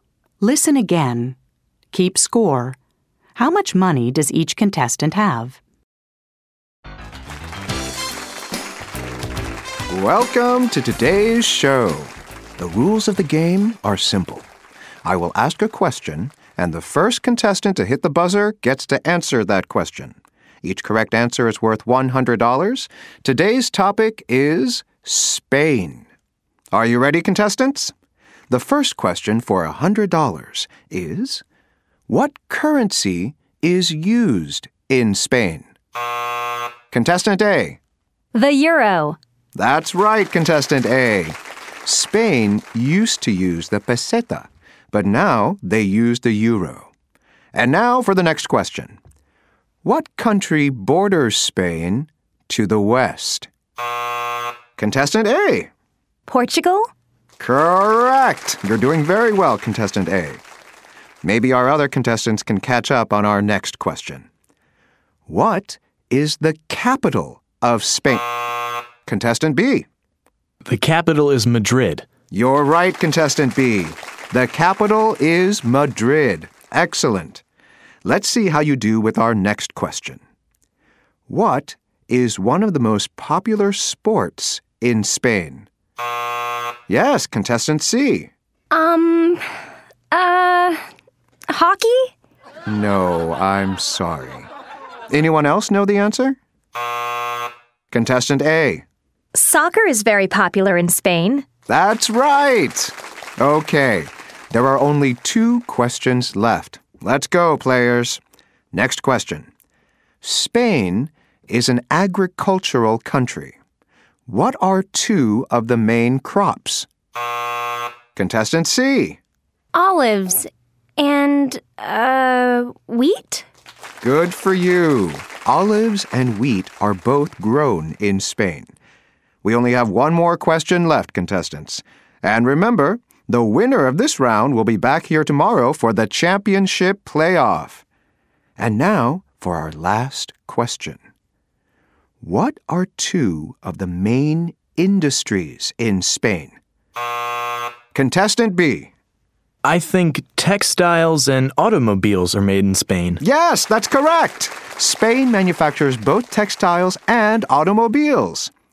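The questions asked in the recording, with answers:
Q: How much money does each contestant have?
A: Contestant A: $300; Contestant B: $200; Contestant C: $100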